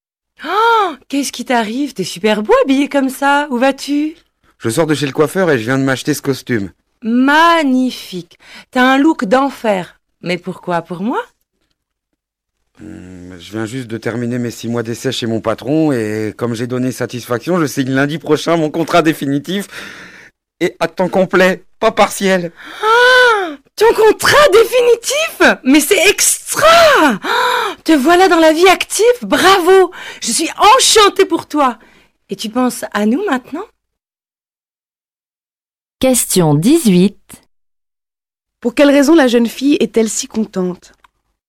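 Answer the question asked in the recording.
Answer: Parce que son ami va signer un contrat définitif à temps complet.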